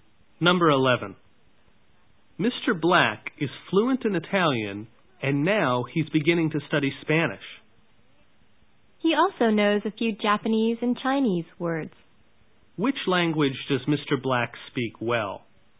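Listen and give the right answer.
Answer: Italian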